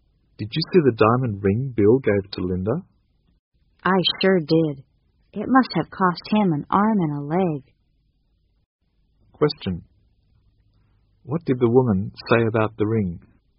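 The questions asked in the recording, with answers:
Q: What did the woman say about the ring?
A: It must have been very expensive.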